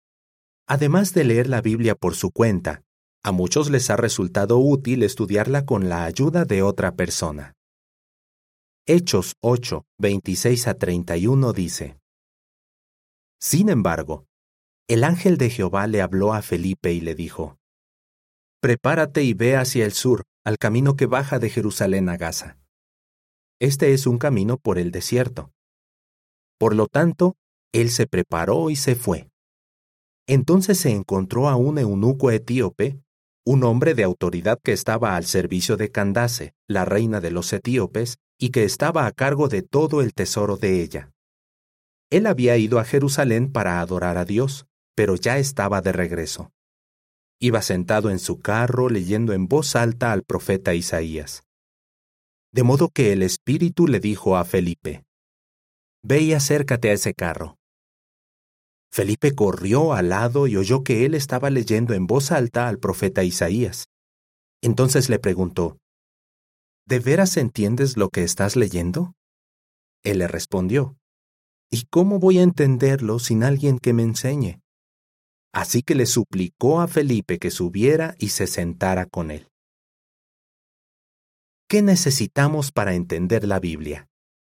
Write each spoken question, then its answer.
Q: ¿Qué necesitamos para entender la Biblia?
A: el hombre de Etiopía necesitó que alguien lo ayudara a entender las Escrituras.